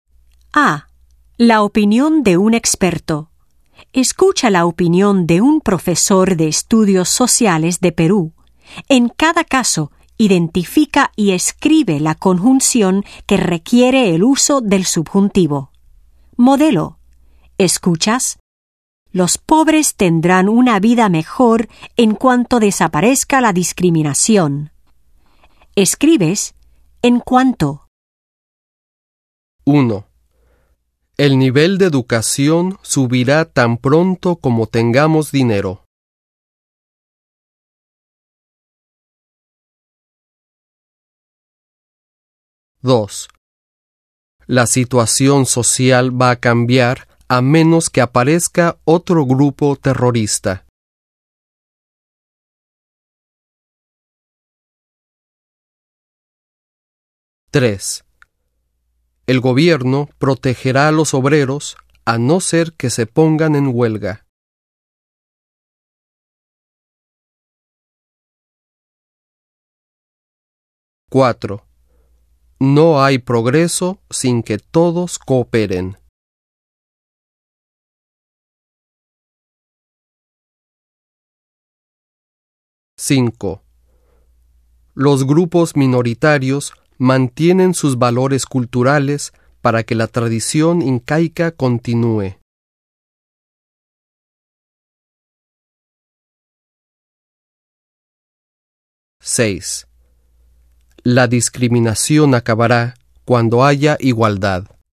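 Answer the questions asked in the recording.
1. tan pronto como
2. a menos que
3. a no ser que
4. sin que
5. para que
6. cuando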